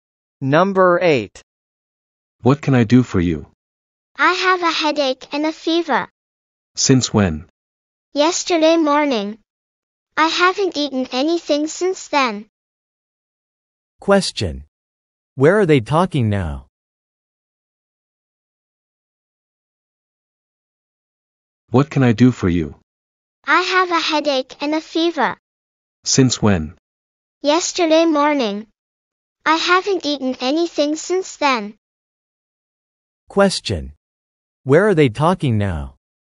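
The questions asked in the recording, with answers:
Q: Where are they talking now?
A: At a hospital (doctor's office)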